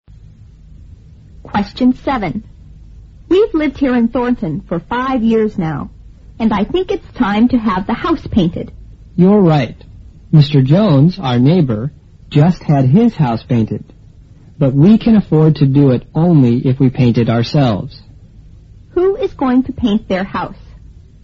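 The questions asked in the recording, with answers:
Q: Who is going to paint their house?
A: The speakers themselves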